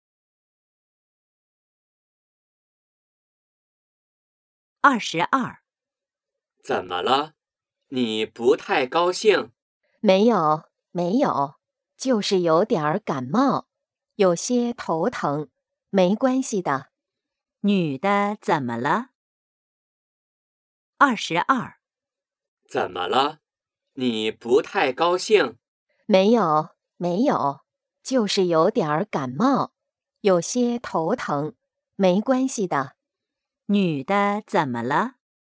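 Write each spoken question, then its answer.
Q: 女的怎么了?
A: 有点感冒,头疼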